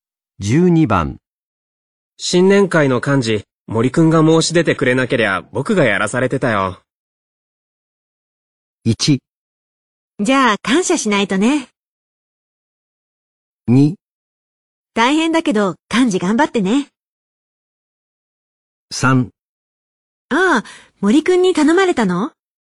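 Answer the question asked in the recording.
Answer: 1: じゃあ感謝しないとね。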